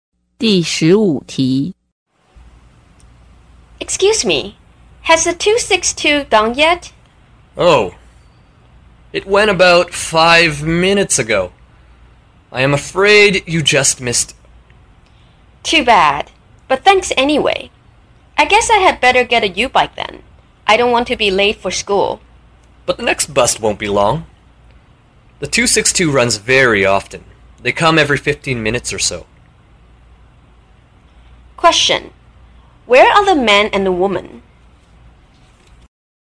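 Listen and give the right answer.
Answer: At a bus stop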